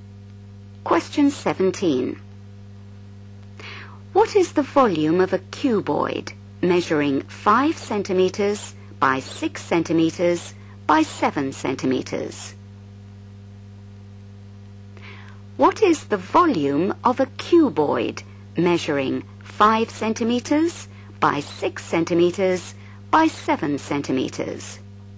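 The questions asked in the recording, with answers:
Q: What is the volume of a cuboid measuring 5 centimetres by 6 centimetres by 7 centimetres?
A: 210 cm3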